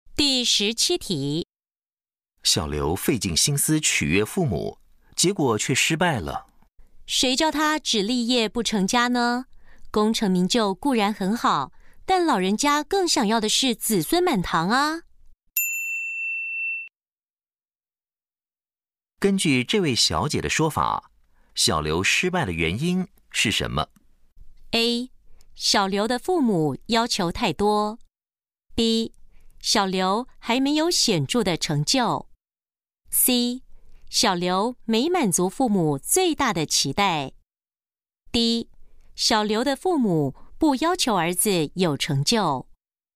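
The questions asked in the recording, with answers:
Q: 根据这位小姐的说法,小刘失败的原因是什么?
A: C: 小刘没满足父母最大的期待。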